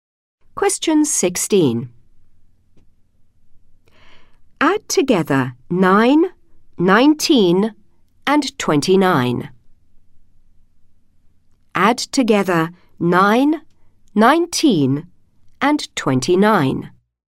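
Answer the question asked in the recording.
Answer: 57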